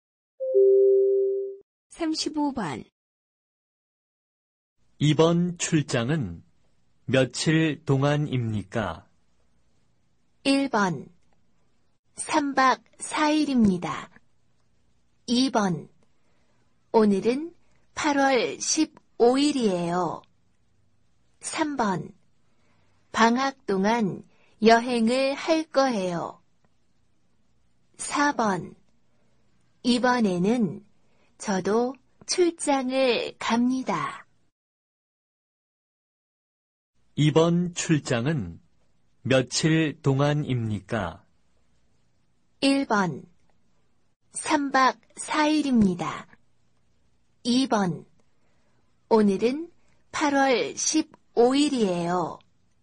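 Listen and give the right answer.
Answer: 1: 3박 4일입니다.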